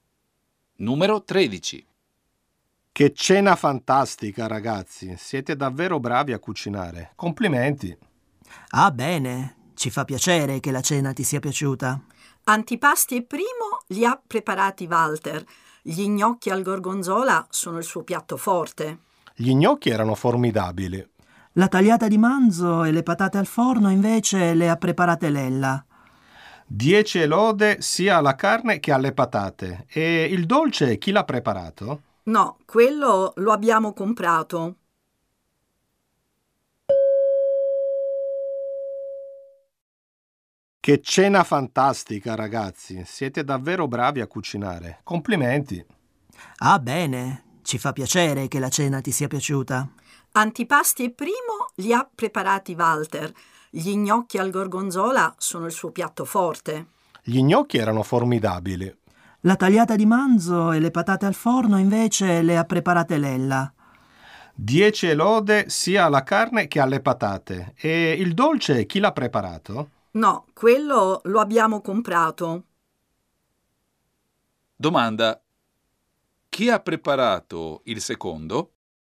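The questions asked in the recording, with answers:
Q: Domanda. Chi ha preparato il secondo?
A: Lella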